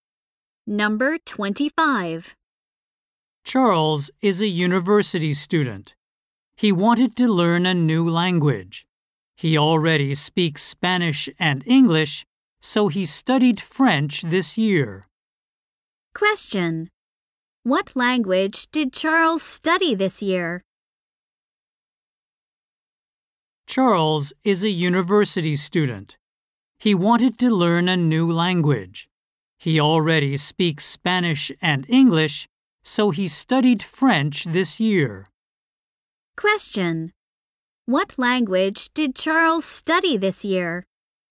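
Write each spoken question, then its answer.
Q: What language did Charles study this year?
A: French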